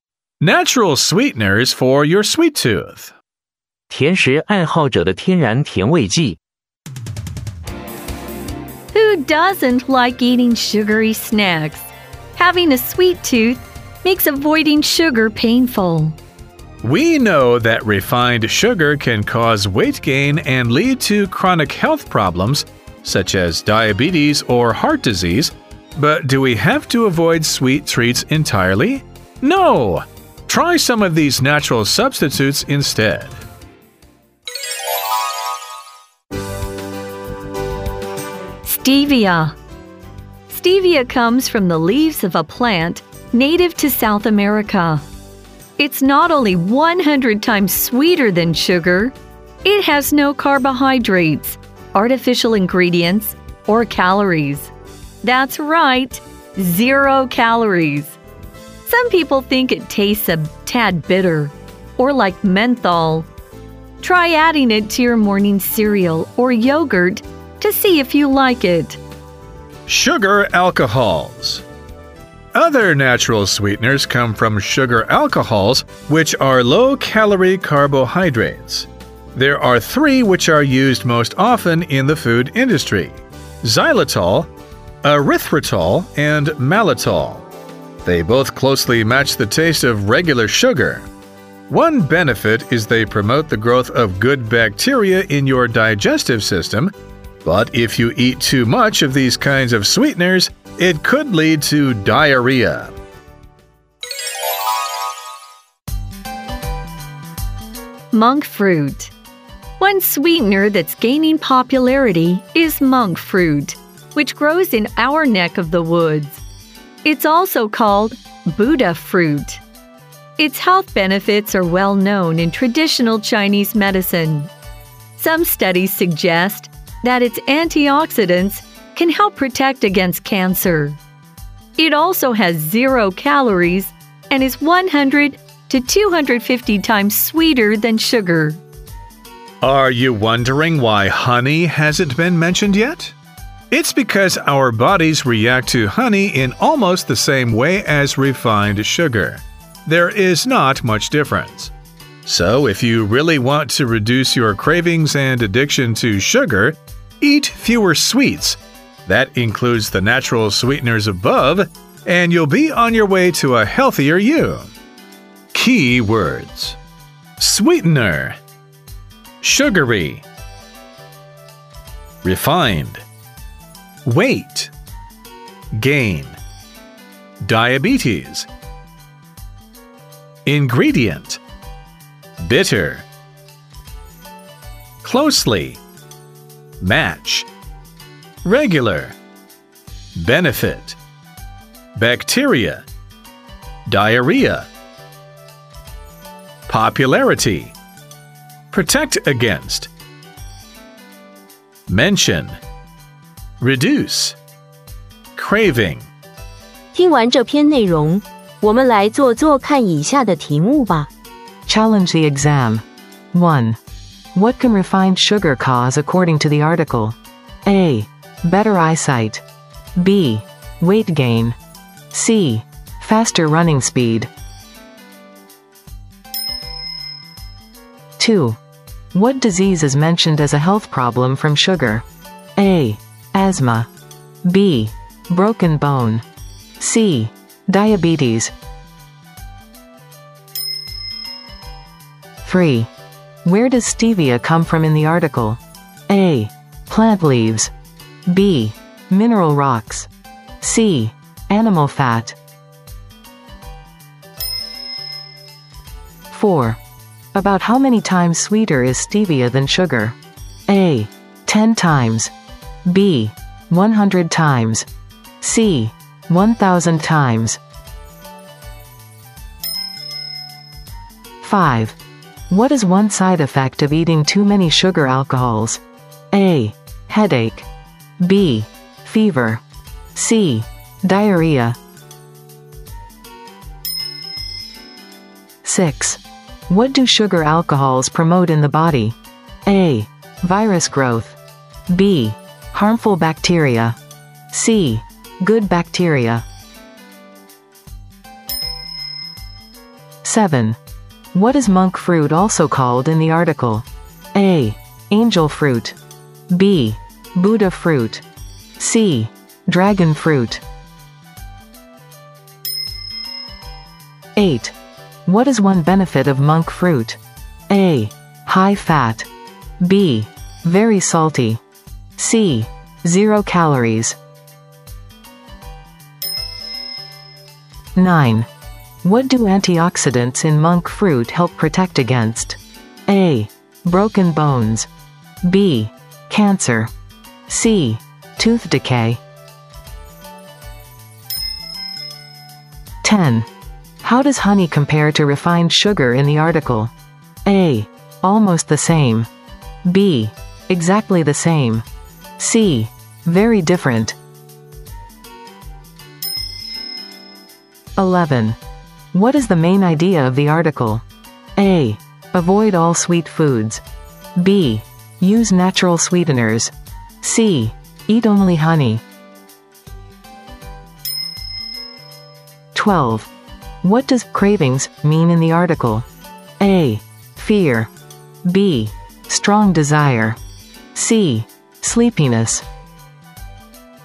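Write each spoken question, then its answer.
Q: What can refined sugar cause according to the article?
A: B: Weight gain.

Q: What disease is mentioned as a health problem from sugar?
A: C: Diabetes.

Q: Where does stevia come from in the article?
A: A: Plant leaves.

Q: About how many times sweeter is stevia than sugar?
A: B: 100 times.

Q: What is one side effect of eating too many sugar alcohols?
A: C: Diarrhea.

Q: What do sugar alcohols promote in the body?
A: C: Good bacteria.

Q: What is monk fruit also called in the article?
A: B: Buddha fruit.

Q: What is one benefit of monk fruit?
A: C: Zero calories.

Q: What do antioxidants in monk fruit help protect against?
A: B: Cancer.

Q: How does honey compare to refined sugar in the article?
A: A: Almost the same.

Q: What does cravings mean in the article?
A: B: Strong desire.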